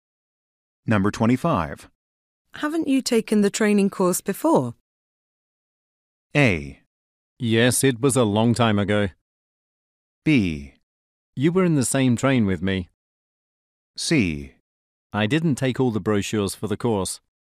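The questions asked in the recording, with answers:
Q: Haven't you taken the training course before?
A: A: Yes, it was a long time ago.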